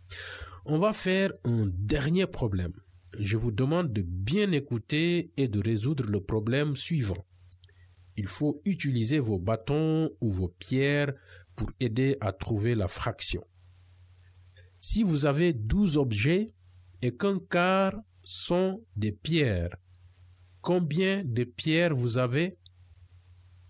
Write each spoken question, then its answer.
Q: Si vous avez 12 objets et qu'un quart sont des pierres, combien de pierres vous avez?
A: Ça veut dire 3 pierres.